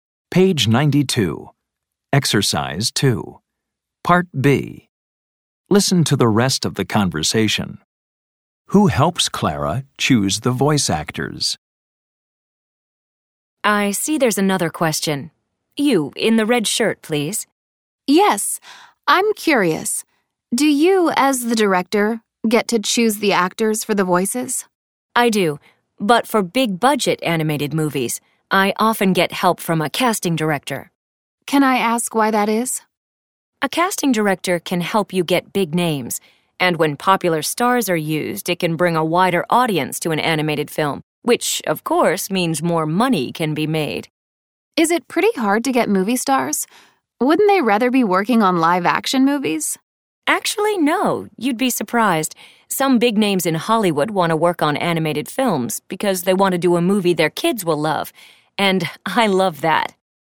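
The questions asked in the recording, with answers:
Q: Who helps Clara choose the voice actors?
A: A casting director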